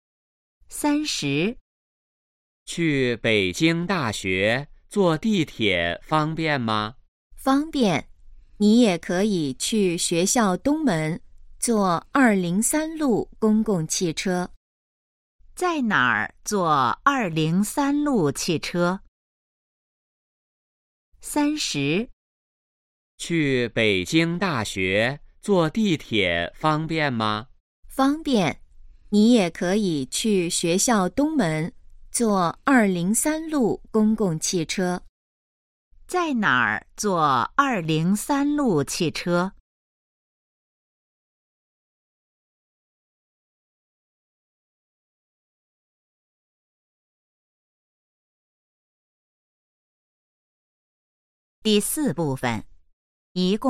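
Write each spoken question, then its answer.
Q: 在哪儿坐203路汽车?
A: 学校东门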